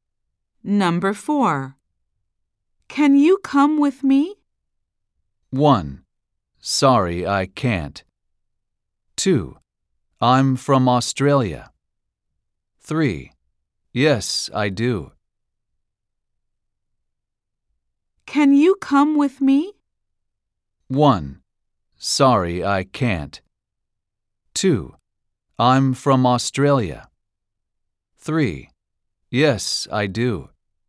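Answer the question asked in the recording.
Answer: 1: Sorry, I can't.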